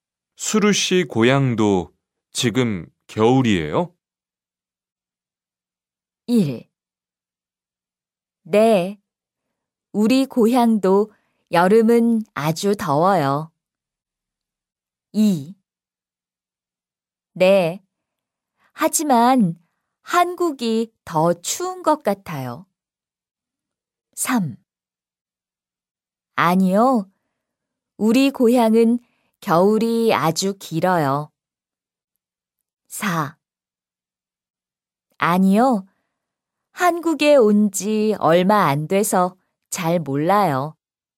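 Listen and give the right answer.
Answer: 2: 네, 하지만 한국이 더 추운 것 같아요.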